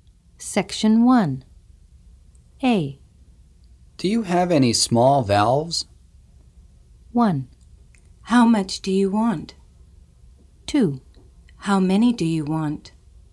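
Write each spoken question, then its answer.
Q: Do you have any small valves?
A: 2: How many do you want?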